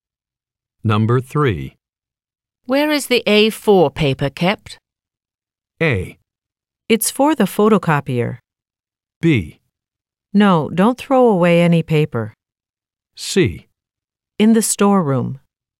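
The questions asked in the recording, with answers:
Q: Where is the A4 paper kept?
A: C: In the storeroom.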